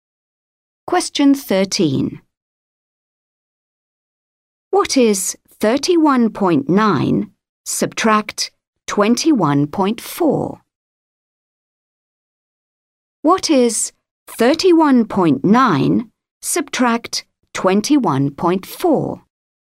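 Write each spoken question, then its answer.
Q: What is 31.9 subtract 21.4?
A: 10.5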